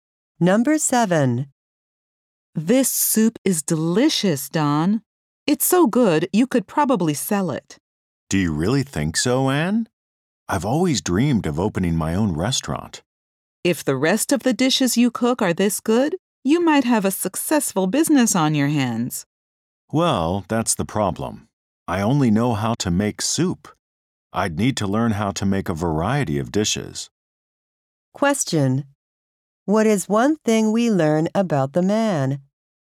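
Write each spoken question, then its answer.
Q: What is one thing we learn about the man?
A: He has dreamed of opening a restaurant but only knows how to make soup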